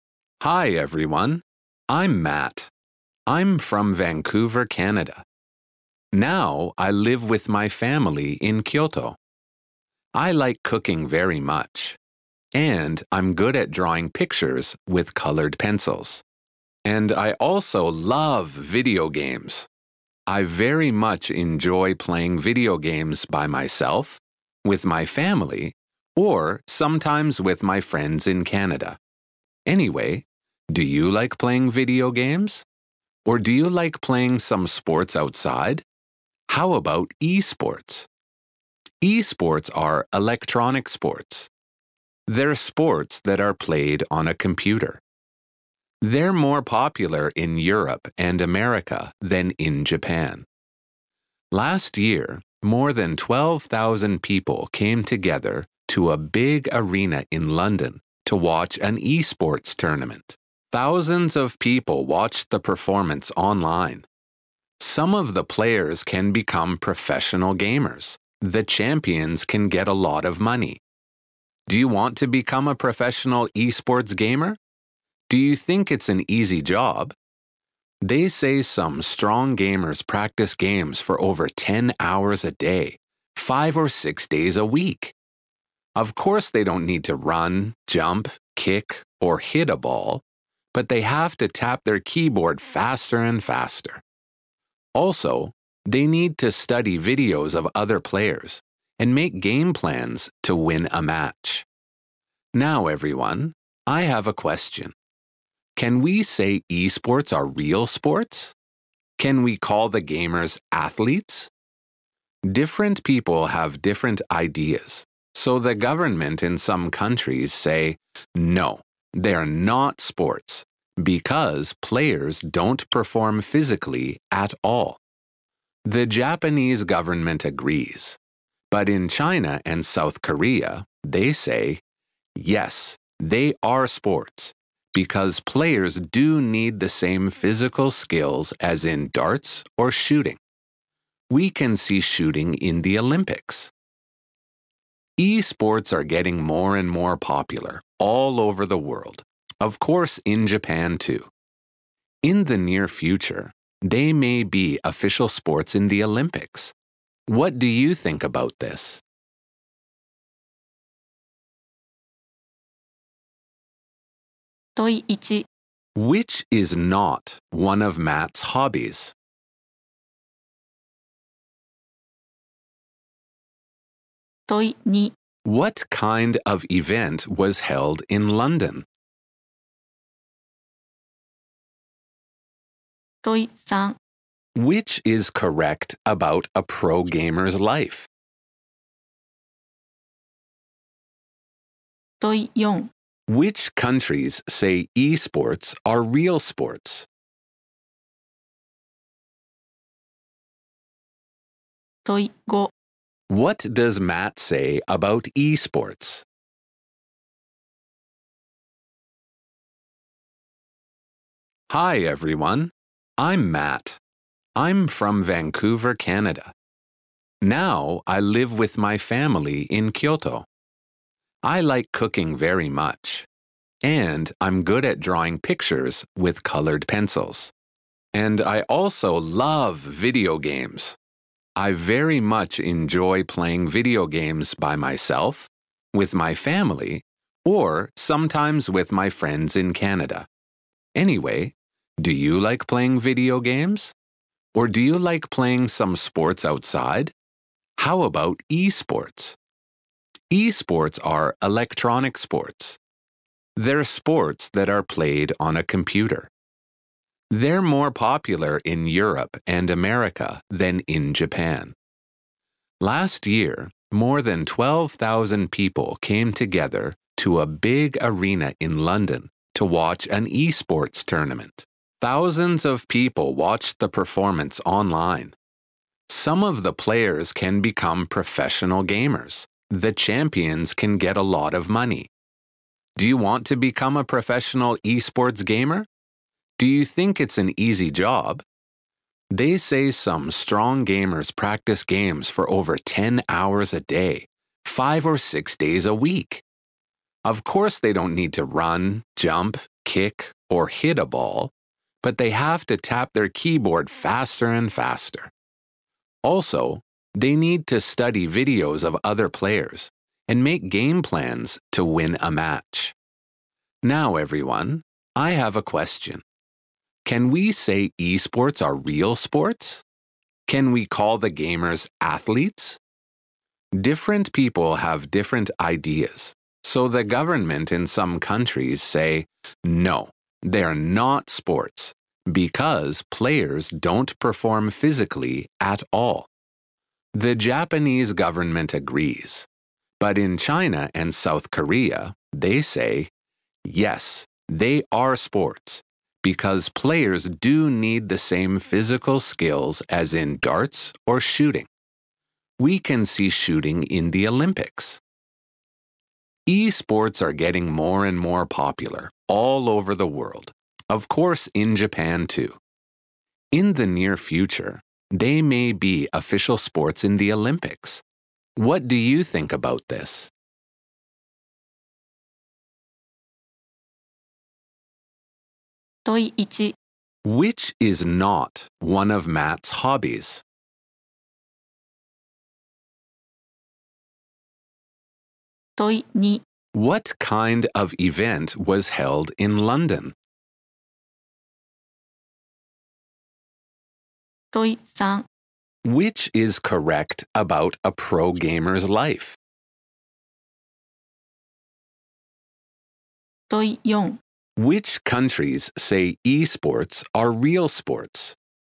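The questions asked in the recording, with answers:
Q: What kind of event was held in London?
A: An esports tournament

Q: Which countries say esports are real sports?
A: China and South Korea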